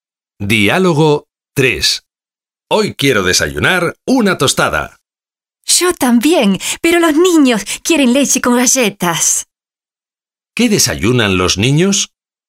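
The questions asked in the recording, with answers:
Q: ¿Qué desayunan los niños?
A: Leche con galletas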